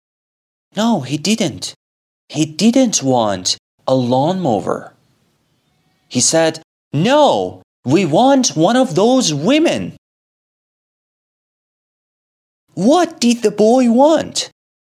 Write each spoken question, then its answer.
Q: What did the boy want?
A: He wanted one of those women.